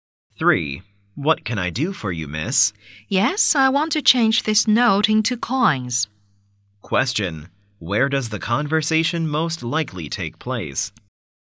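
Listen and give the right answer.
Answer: In a bank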